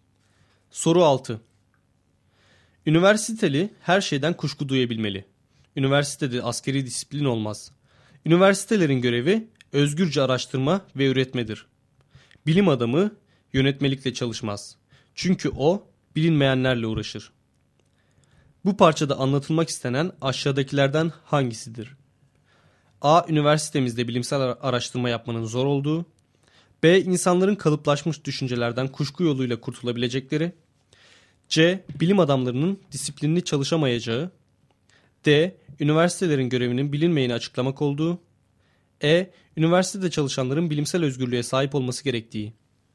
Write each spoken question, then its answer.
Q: Bu parçada anlatılmak istenen aşağıdakilerden hangisidir?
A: Doğru cevap E şıkkı.